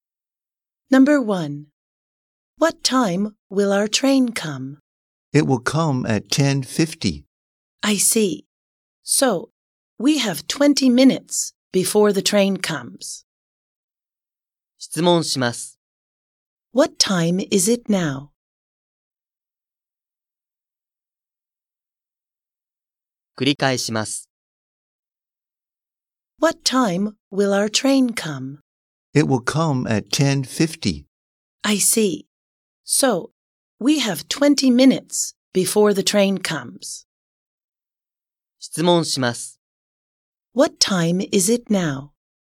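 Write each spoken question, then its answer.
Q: What time is it now?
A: 10:30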